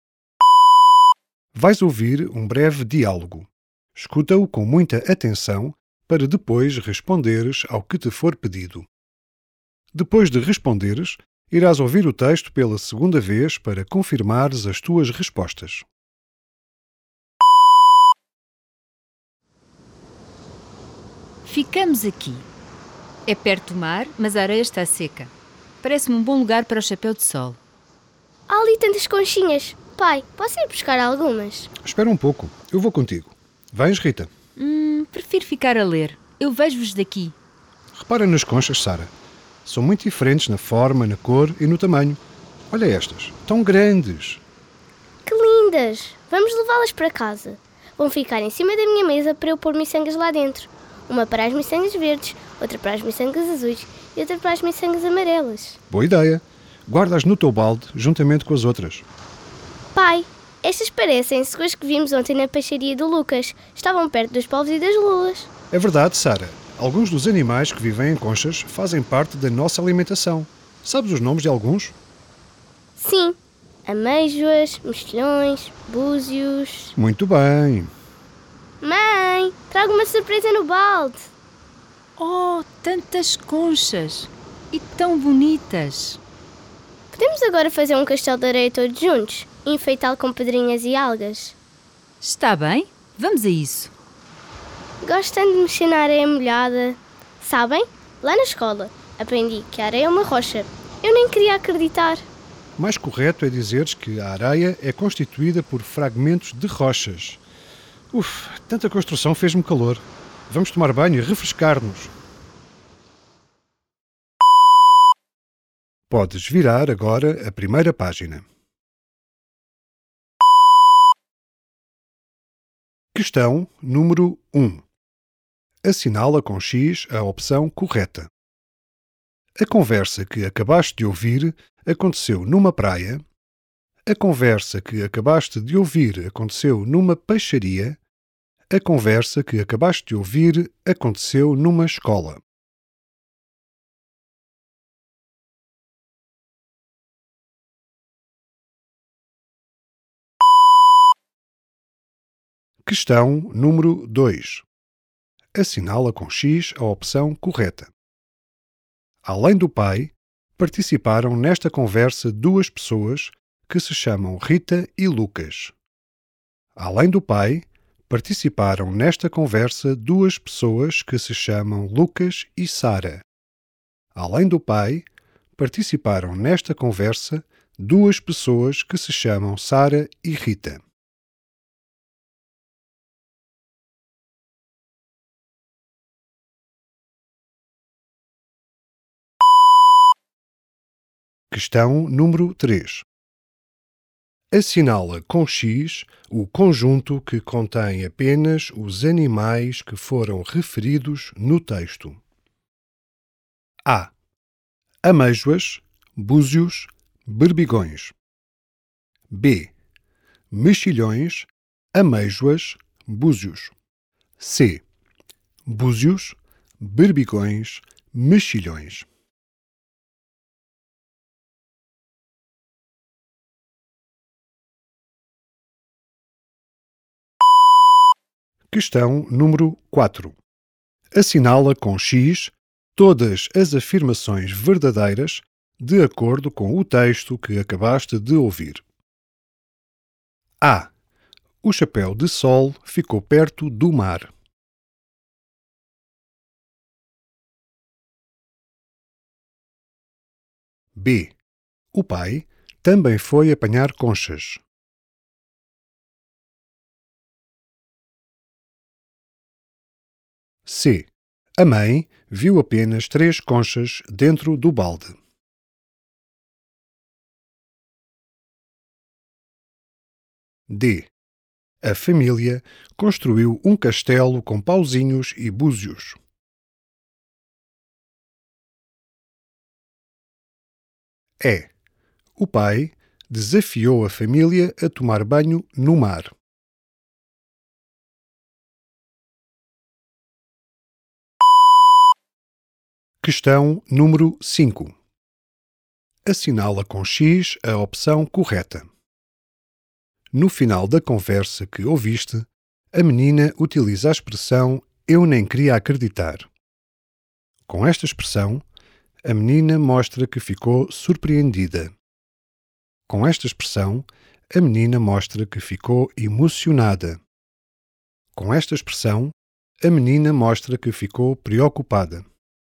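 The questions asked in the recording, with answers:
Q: A conversa que acabaste de ouvir aconteceu numa praia.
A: numa praia

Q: Além do pai, participaram nesta conversa duas pessoas que se chamam Rita e Lucas.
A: Sara e Rita

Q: Questão número 3. Assinala com X o conjunto que contém apenas os animais que foram referidos no texto.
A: B: Mexilhões, ameijoas, búzios.

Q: No final da conversa que ouviste, a menina utiliza a expressão "eu nem queria acreditar".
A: ficou surpreendida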